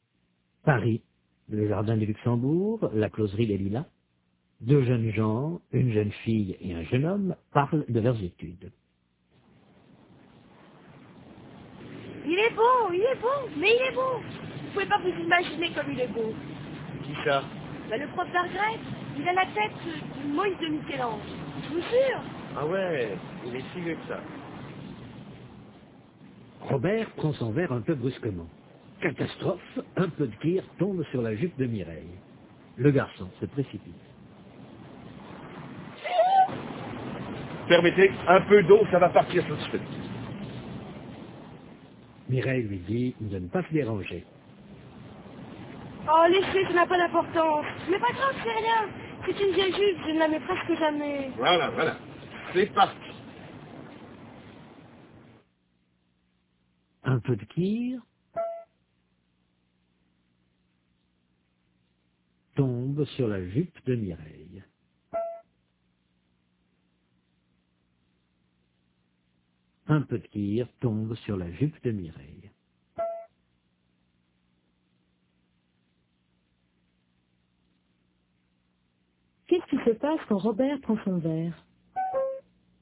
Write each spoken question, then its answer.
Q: Qu'est-ce qui se passe quand Robert prend son verre?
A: Un peu de kir tombe sur la jupe de Mireille.